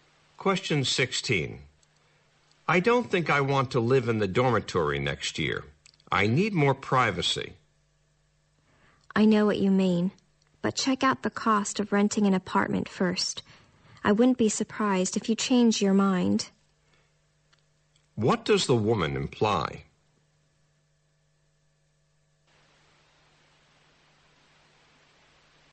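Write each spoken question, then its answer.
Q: What does the woman imply?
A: Renting an apartment may cost too much, so the man may decide to stay in the dormitory.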